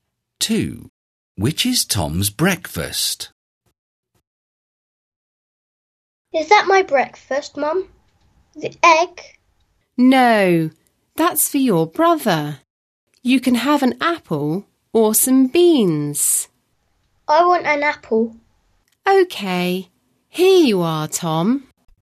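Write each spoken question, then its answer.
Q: Which is Tom's breakfast?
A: An apple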